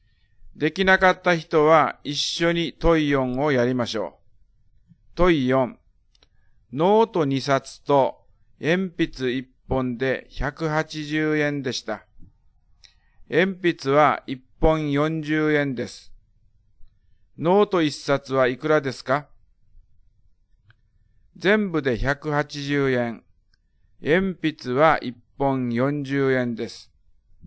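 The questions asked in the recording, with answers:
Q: ノート一冊はいくらですか?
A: 70円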